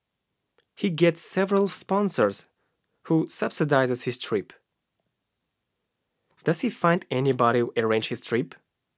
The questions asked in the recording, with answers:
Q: Does he find anybody who arrange his trip?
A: Yes, he finds several sponsors.